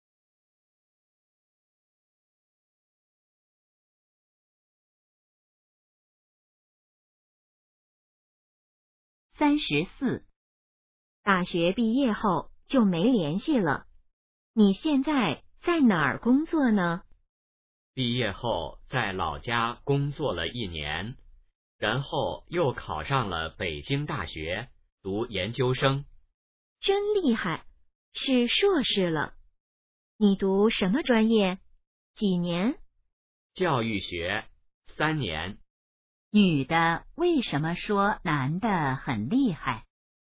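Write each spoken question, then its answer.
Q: 女的为什么说男的很厉害?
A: 他考上北京大学读研究生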